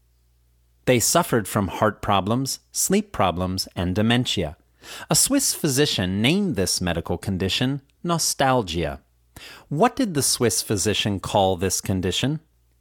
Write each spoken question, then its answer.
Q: What did the Swiss physician call this condition?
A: He called this condition nostalgia.